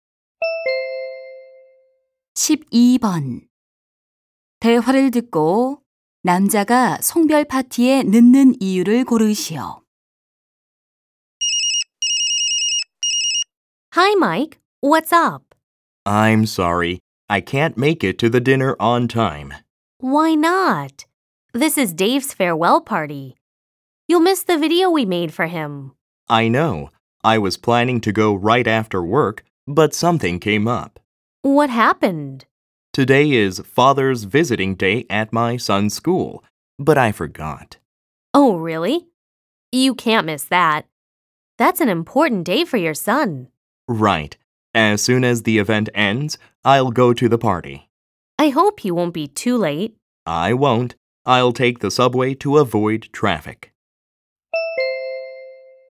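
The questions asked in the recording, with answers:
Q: 대화를 듣고 남자가 송별 파티에 늦는 이유를 고르시오.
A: 아들 학교의 아버지 방문의 날 행사에 가야 해서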